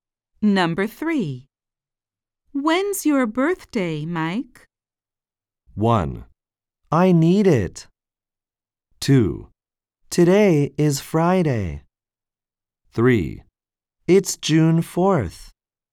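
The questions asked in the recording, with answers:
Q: When's your birthday, Mike?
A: 3: It's June 4th.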